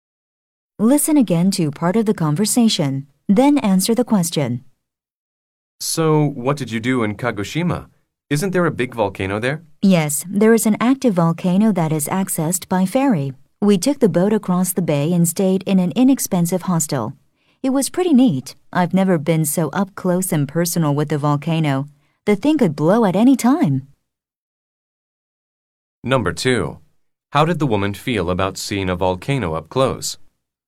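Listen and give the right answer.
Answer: She thought it was pretty neat (exciting), as she had never been so close to a volcano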